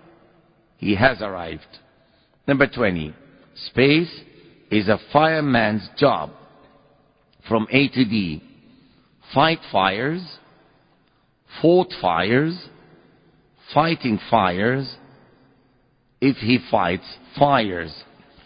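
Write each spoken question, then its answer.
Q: Space is a fireman's job.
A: C: fighting fires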